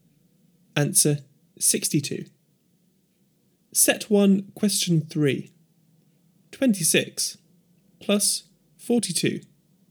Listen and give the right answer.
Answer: Answer 68.